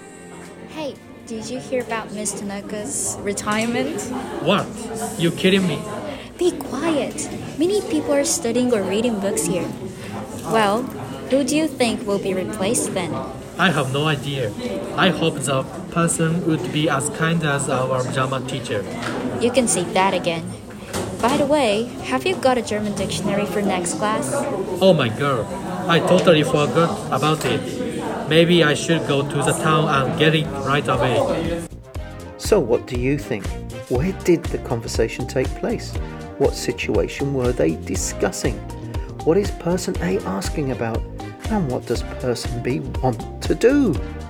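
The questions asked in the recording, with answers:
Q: Where did the conversation take place?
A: In a library

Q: What situation were they discussing?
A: Miss Tanaka (a teacher) is retiring

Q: What is person A asking about?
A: Whether B has a German dictionary for the next class

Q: And what does person B want to do?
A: Go to town and buy a German dictionary right away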